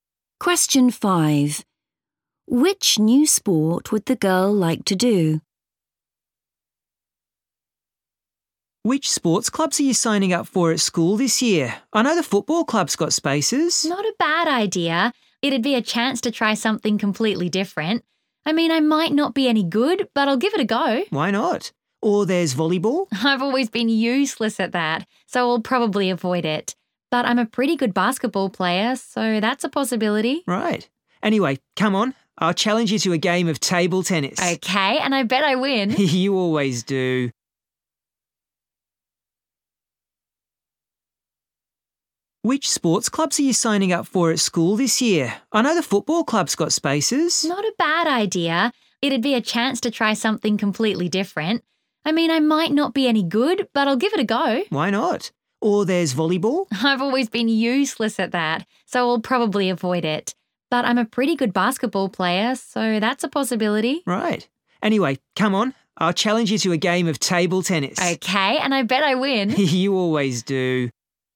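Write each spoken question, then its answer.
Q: Which new sport would the girl like to do?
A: football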